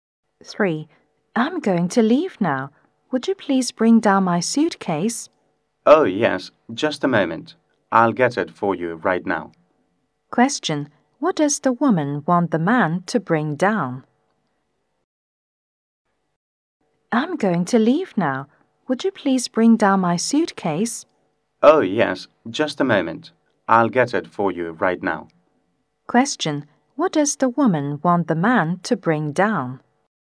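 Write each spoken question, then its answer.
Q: What does the woman want the man to bring down?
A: Her suitcase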